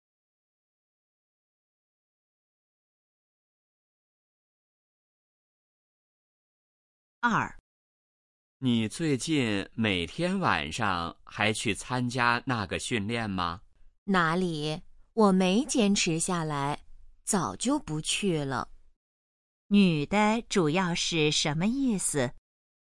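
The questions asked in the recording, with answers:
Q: 女的主要是什么意思?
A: 她早就不去参加训练了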